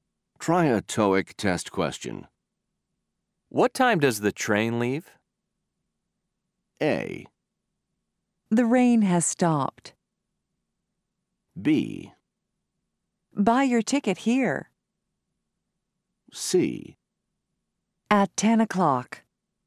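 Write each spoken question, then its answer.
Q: What time does the train leave?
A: C: At 10 o'clock.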